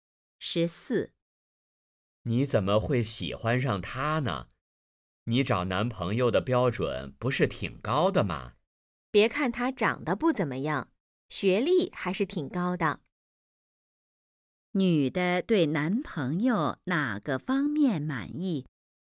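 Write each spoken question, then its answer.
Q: 女的对男朋友哪个方面满意?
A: 学历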